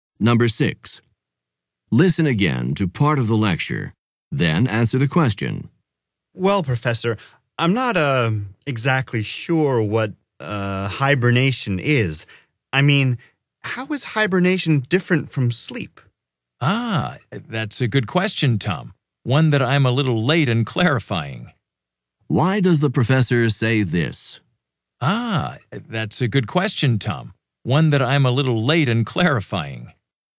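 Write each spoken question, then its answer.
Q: Why does the professor say this?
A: To admit that he should have explained what hibernation is earlier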